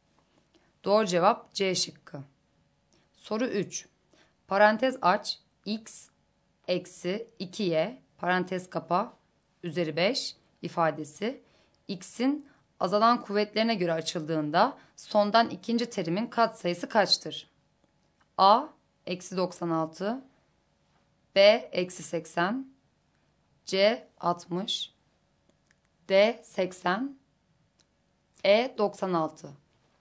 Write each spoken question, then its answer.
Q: Parantez aç x eksi 2y parantez kapa üzeri 5 ifadesi x'in azalan kuvvetlerine göre açıldığında sondan ikinci terimin katsayısı kaçtır?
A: Doğru cevap D şıkkı.